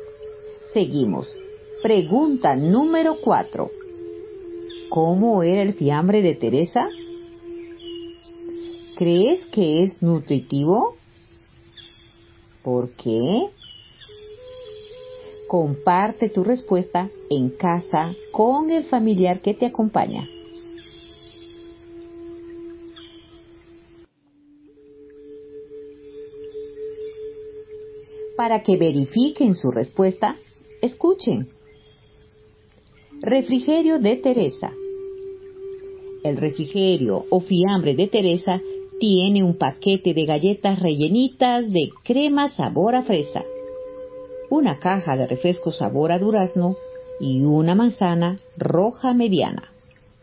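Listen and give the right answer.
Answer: Un paquete de galletas rellenitas de crema sabor a fresa, una caja de refresco sabor a durazno y una manzana roja mediana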